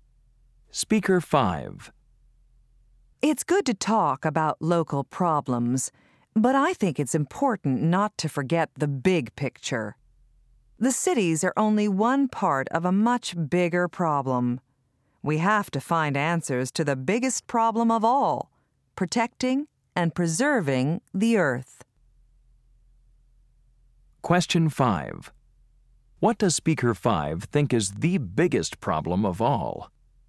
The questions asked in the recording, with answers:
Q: What does Speaker 5 think is the biggest problem of all?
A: protecting and preserving the Earth